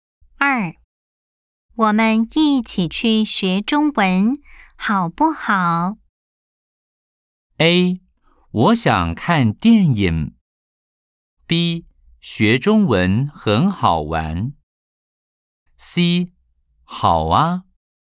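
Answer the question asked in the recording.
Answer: C: 好啊。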